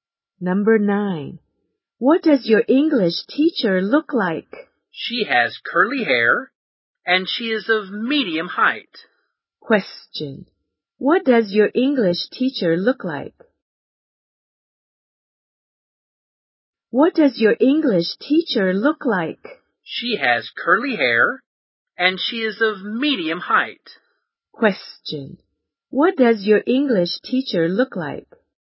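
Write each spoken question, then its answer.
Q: What does your English teacher look like?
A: She has curly hair and is of medium height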